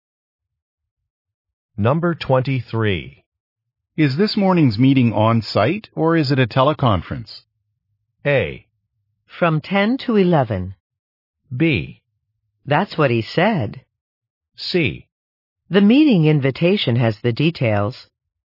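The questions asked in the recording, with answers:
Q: Is this morning's meeting on-site or is it a teleconference?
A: C: The meeting invitation has the details.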